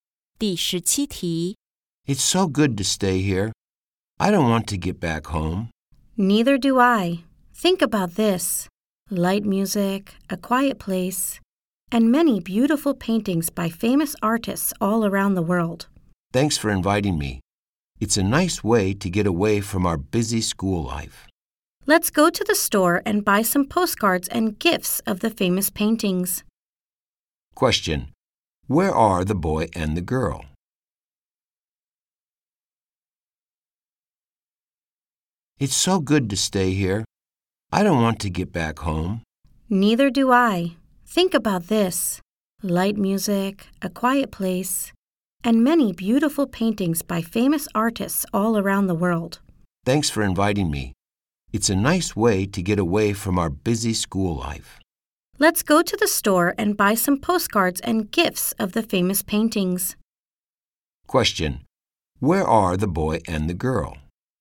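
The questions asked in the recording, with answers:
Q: Question: Where are the boy and the girl?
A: In an art museum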